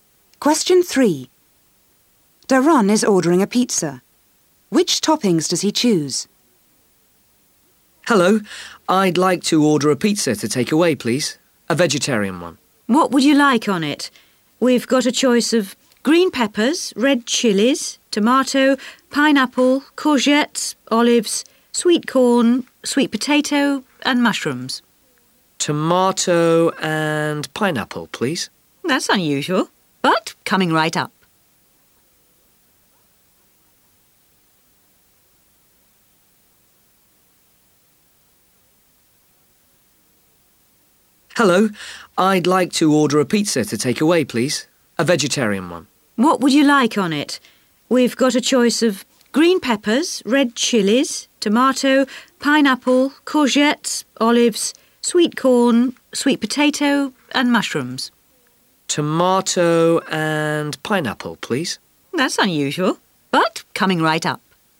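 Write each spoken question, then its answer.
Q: Which toppings does he choose?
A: Tomato and pineapple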